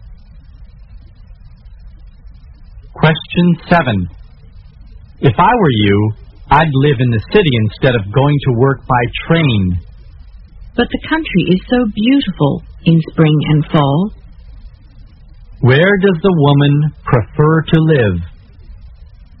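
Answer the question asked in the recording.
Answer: In the country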